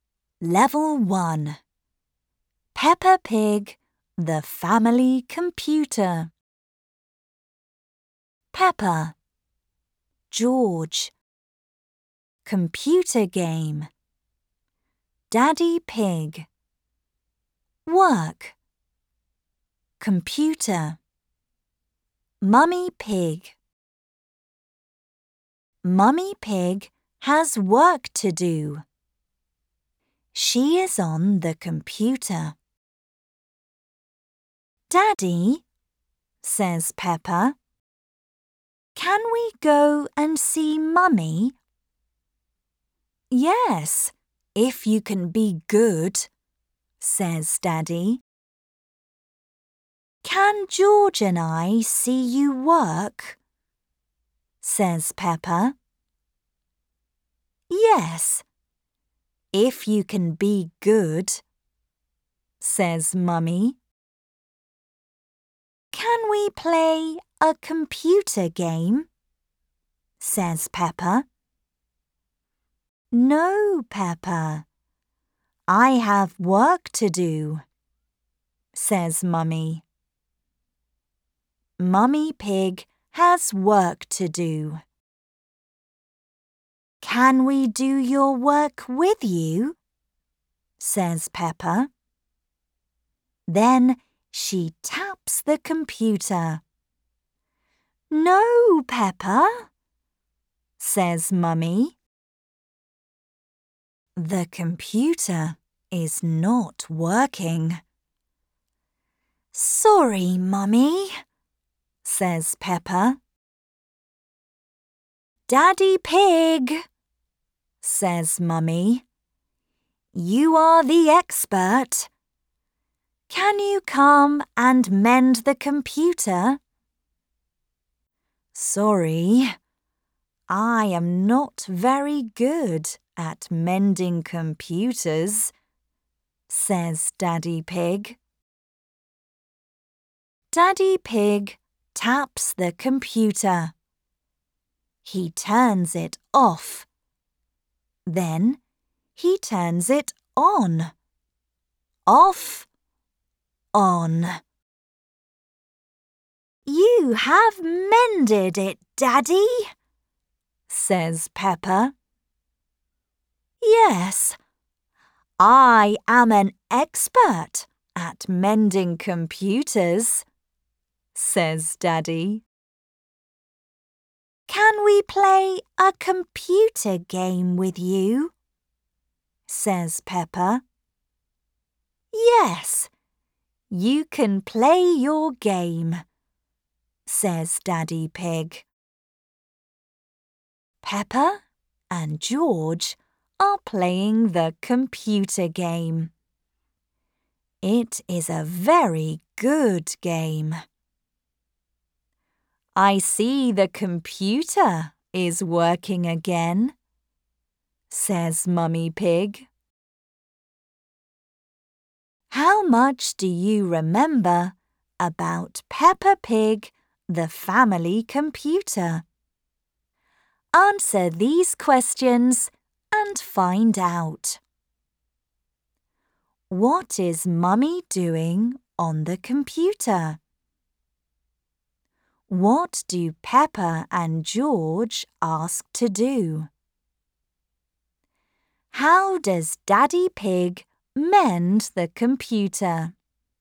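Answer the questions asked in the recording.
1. Her work
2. Play a computer game
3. He turns it off and then on again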